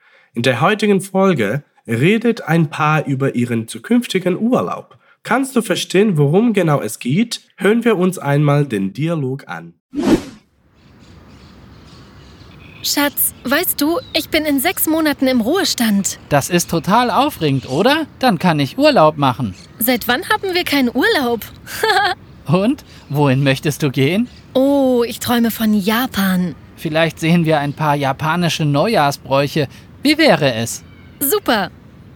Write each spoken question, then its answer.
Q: Kannst du verstehen, worum genau es geht?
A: Du hast es bestimmt bemerkt, dass das Paar eine Reise plant.